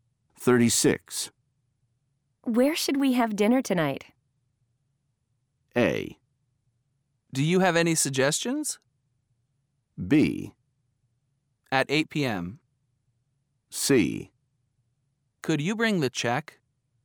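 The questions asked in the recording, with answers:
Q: Where should we have dinner tonight?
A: A: Do you have any suggestions?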